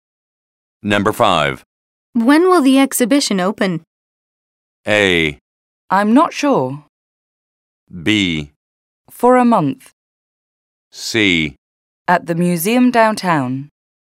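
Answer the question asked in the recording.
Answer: A: I'm not sure.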